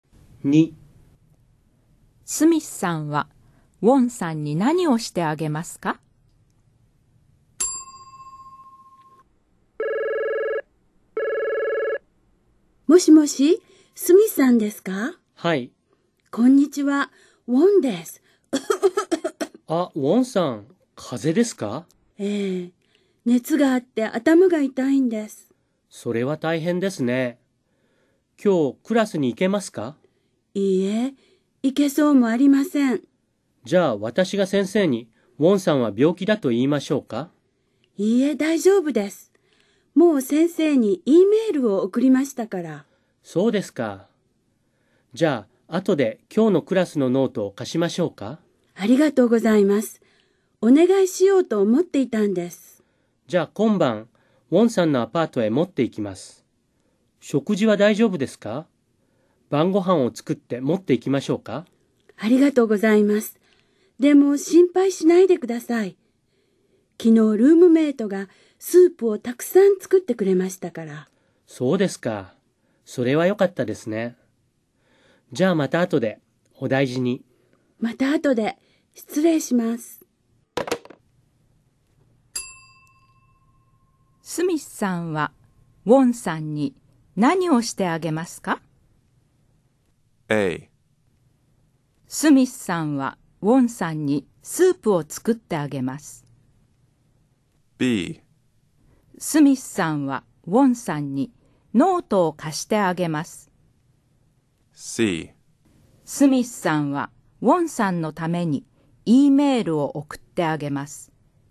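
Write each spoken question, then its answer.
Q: スミスさんはウォンさんに何をしてあげますか?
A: B: スミスさんはウォンさんにノートを貸してあげます。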